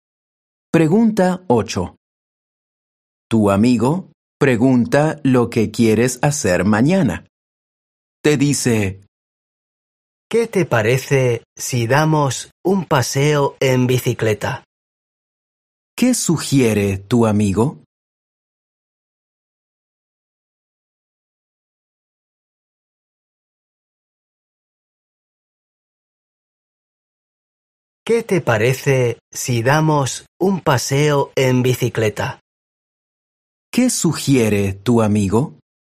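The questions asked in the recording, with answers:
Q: ¿Qué sugiere tu amigo?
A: Dar un paseo en bicicleta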